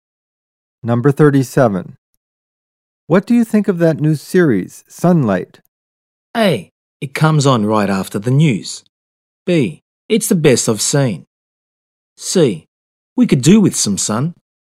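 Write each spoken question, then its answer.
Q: What do you think of that new series, Sunlight?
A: B: It's the best I've seen.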